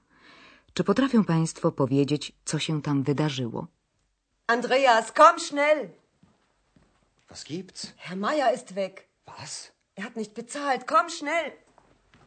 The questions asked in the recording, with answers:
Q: Czy potrafią Państwo powiedzieć, co się tam wydarzyło?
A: powodem zdenerwowania Hany jest nagłe zniknięcie pana Majera i to bez uregulowania rachunku za pokój.